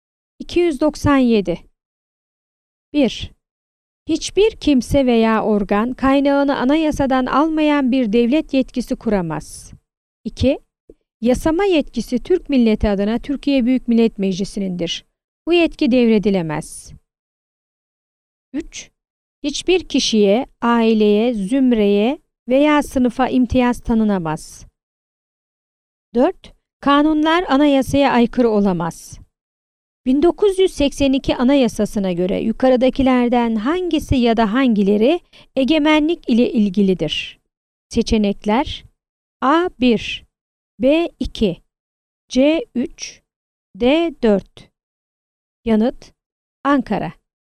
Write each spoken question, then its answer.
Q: 1982 Anayasası'na göre yukarıdakilerden hangisi ya da hangileri egemenlik ile ilgilidir?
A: Yanıt: Ankara.